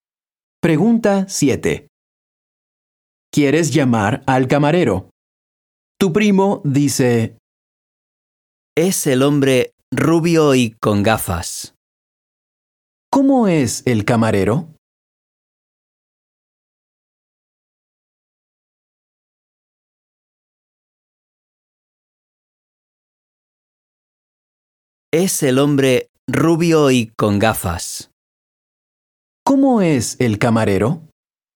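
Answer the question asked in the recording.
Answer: Rubio y con gafas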